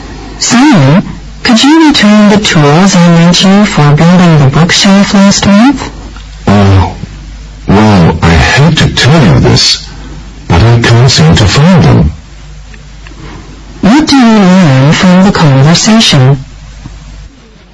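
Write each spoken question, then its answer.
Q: What do you learn from the conversation?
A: Simon can't find the tools he borrowed for the bookshelf.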